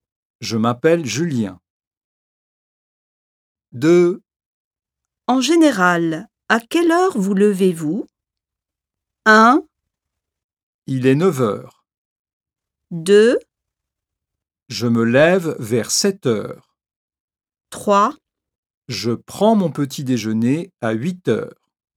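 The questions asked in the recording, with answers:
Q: En général, à quelle heure vous levez-vous?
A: 2: Je me lève vers 7h.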